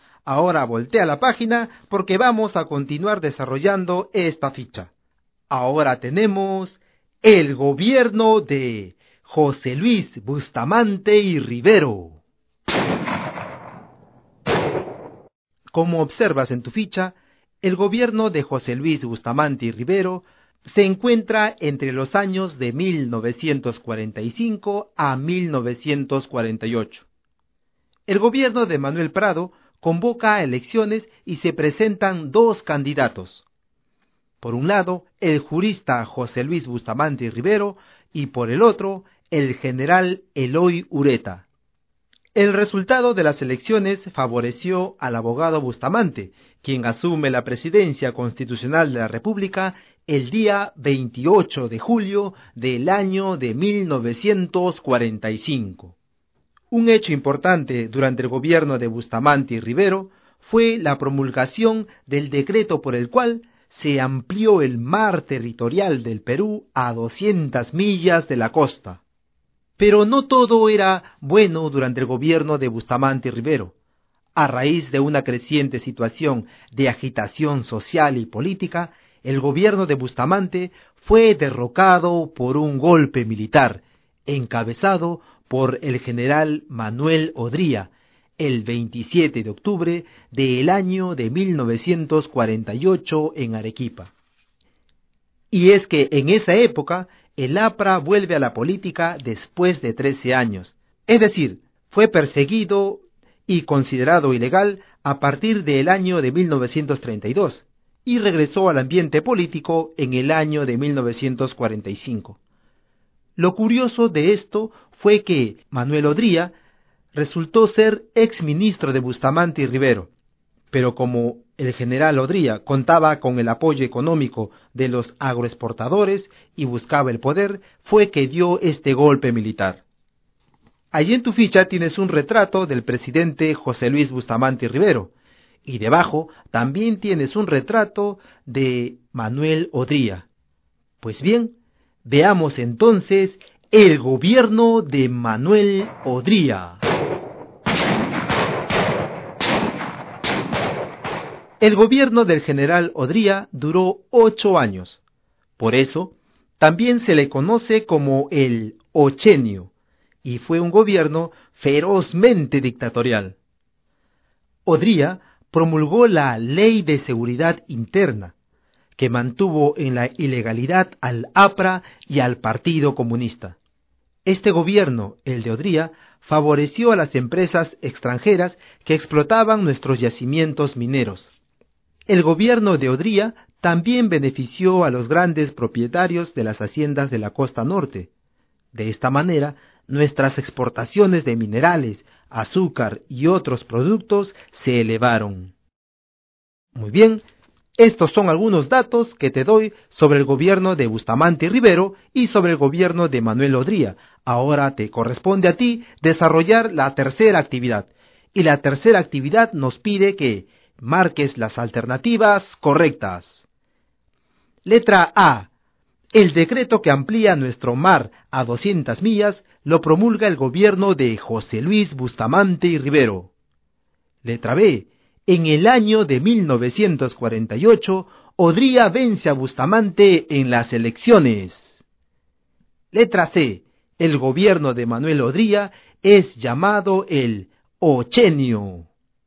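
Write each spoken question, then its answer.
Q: El decreto que amplía nuestro mar a 200 millas lo promulga el gobierno de José Luis Bustamante y Rivero.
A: Correcta

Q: En el año de 1948, Odría vence a Bustamante en las elecciones.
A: Incorrecta (fue un golpe militar)

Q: El gobierno de Manuel Odría es llamado el ochenio.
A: Correcta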